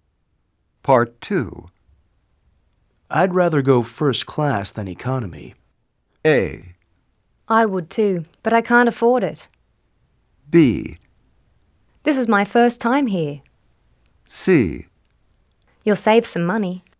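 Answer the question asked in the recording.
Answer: A: I would too, but I can't afford it.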